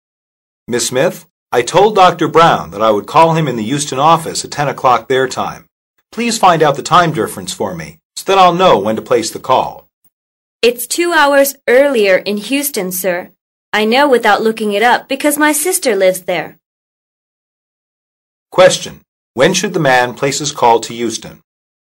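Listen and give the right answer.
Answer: At 12 noon his time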